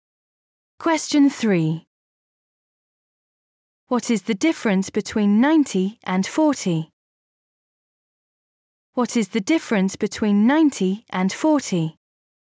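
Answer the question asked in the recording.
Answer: 50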